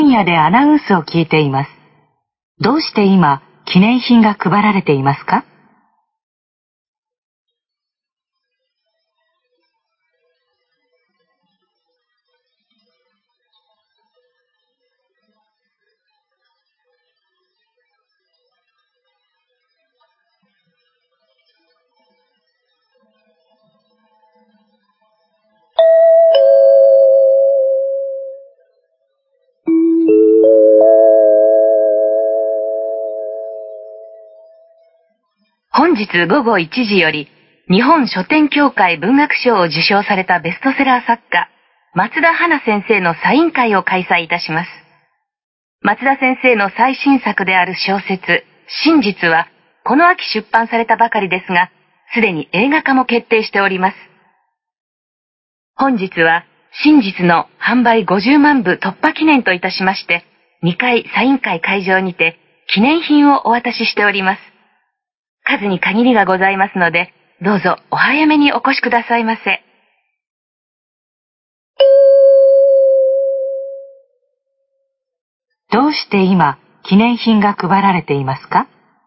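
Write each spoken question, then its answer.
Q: どうして今、記念品が配られていますか?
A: 小説『真実』の販売が50万部を突破したから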